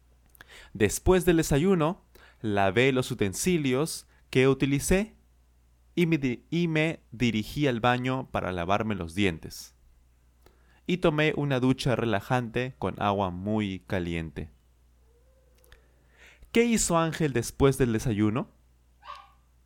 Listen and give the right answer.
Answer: Sí, sí, claro. Él lavó sus utensilios, los utensilios, los platos, las cucharas, los tenedores, los vasos, los utensilios que utilizó y se dirigió al baño a lavarse los dientes.